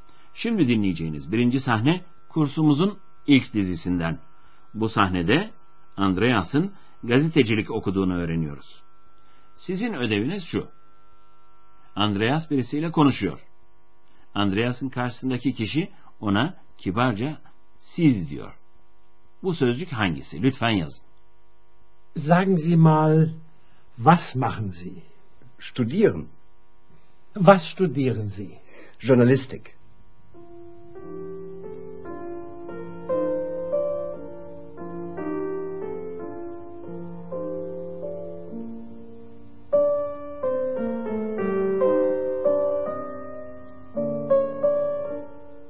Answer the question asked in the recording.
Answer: siz sözcüğünün Almancası sie.